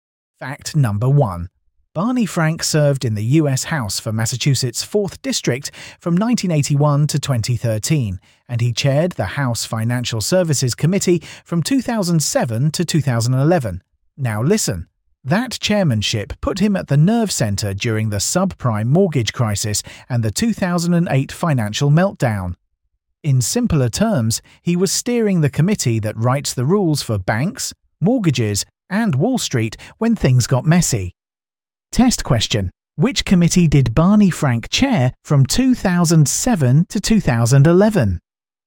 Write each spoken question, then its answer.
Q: Which committee did Barney Frank chair from 2007 to 2011?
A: The House Financial Services Committee.